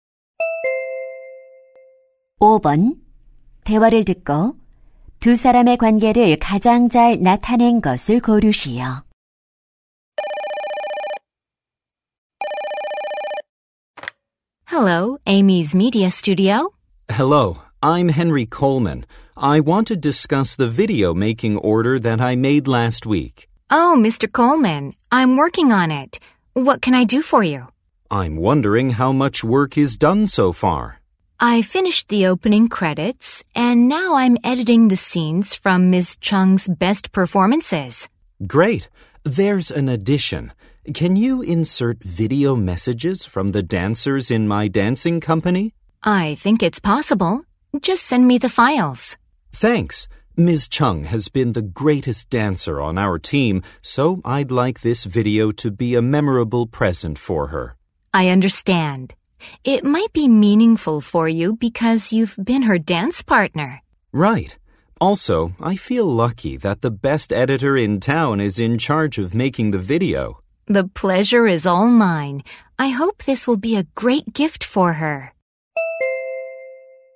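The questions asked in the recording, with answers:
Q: 대화를 듣고 두 사람의 관계를 가장 잘 나타낸 것을 고르시오.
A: 영상 제작 의뢰인(무용수) - 영상 편집자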